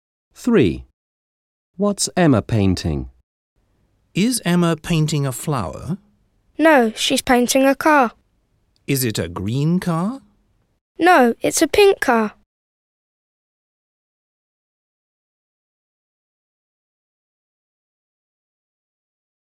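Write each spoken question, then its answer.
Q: What's Emma painting?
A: a pink car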